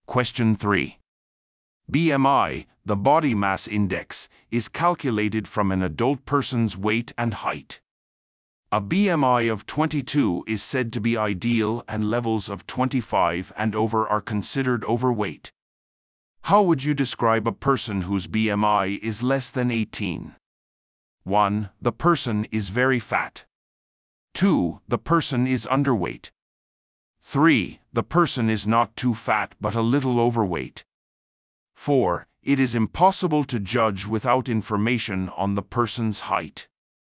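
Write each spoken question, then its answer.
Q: How would you describe a person whose BMI is less than 18?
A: 2: The person is underweight.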